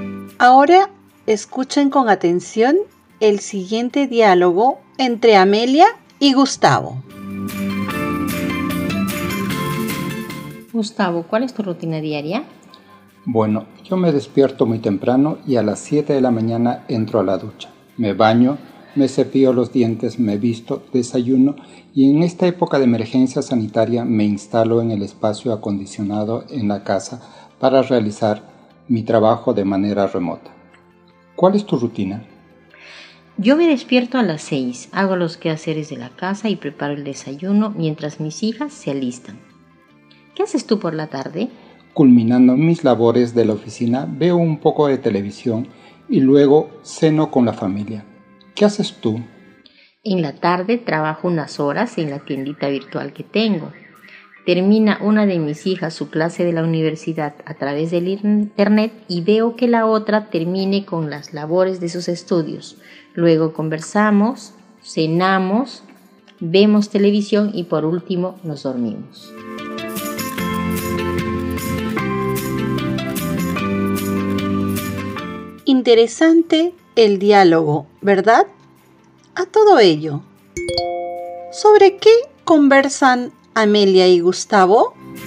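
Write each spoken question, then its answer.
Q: ¿Sobre qué conversan Amelia y Gustavo?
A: Sobre su rutina diaria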